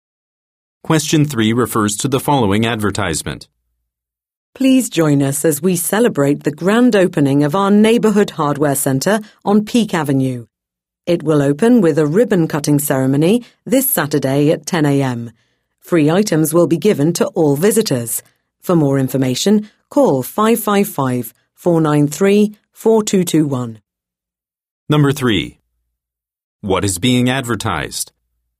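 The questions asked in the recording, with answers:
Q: What is being advertised?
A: The grand opening of a hardware store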